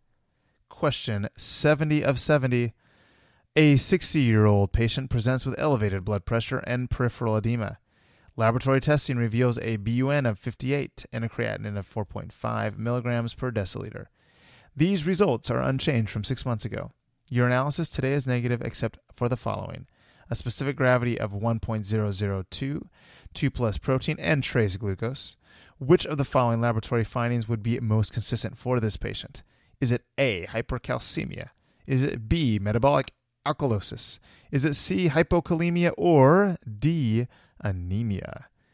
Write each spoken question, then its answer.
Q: Which of the following laboratory findings would be most consistent for this patient?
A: The answer is D, anemia.